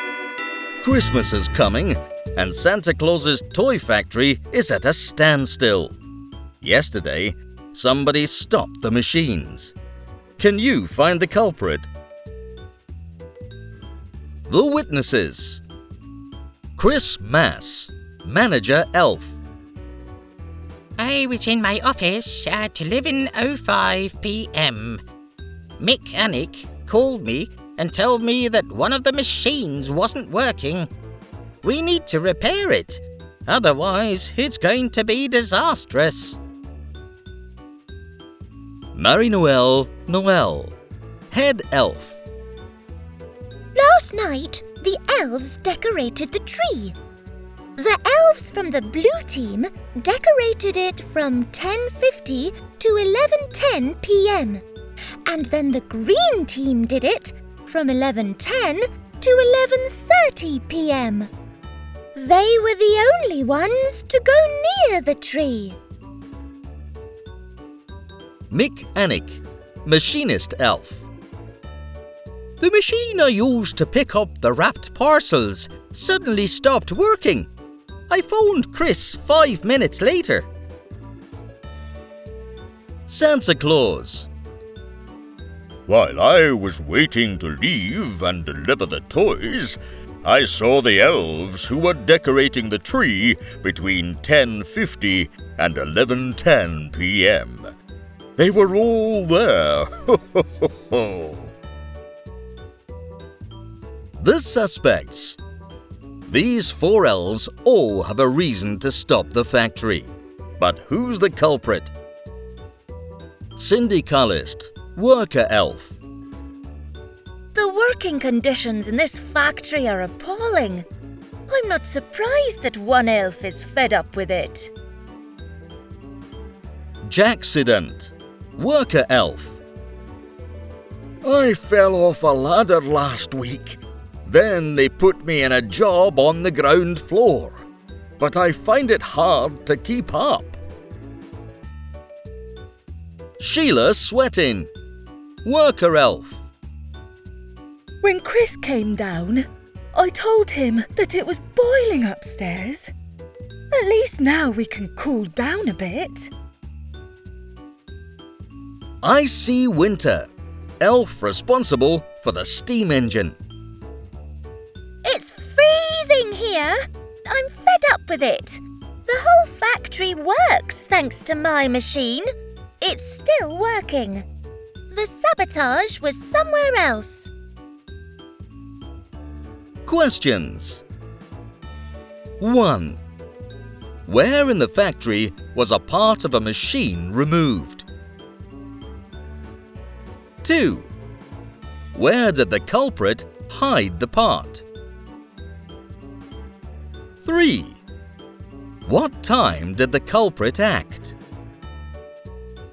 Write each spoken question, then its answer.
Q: What time did the culprit act?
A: It was 11:05 p.m. then, so the sabotage happened at 11 p.m.